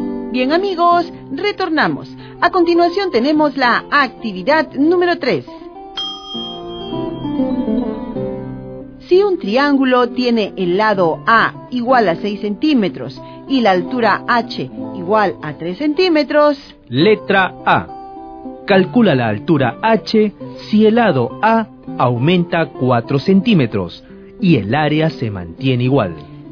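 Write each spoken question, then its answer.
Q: Calcula la altura H si el lado A aumenta 4 centímetros y el área se mantiene igual.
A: 1,8 centímetros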